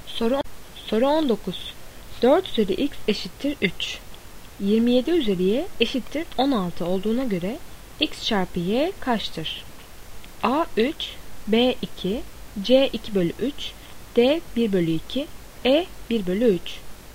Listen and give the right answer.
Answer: Doğru cevap C 2 bölü 3.